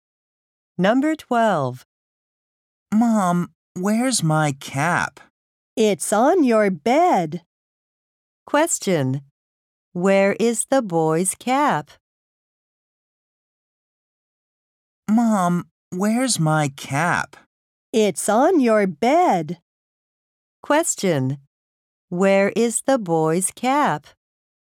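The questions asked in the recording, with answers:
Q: Where is the boy's cap?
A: On his bed.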